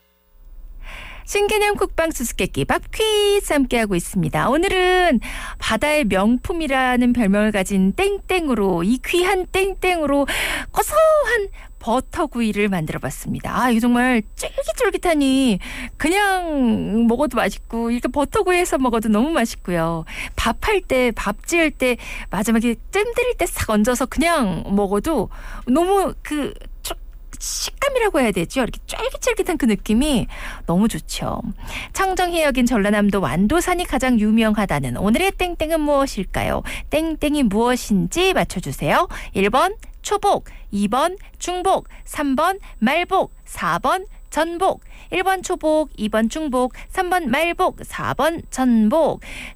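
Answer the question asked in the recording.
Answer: 4: 전복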